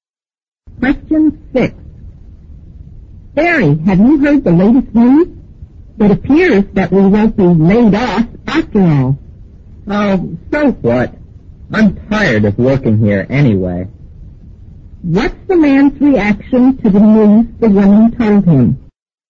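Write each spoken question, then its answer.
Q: What's the man's reaction to the news the woman told him?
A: He doesn't care; he's tired of working there anyway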